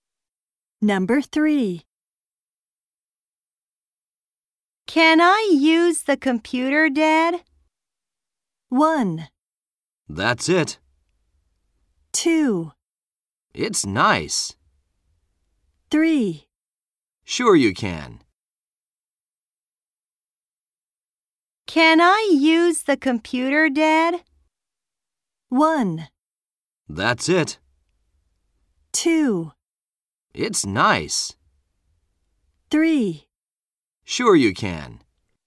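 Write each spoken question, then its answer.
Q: Can I use the computer, Dad?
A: 3: Sure you can.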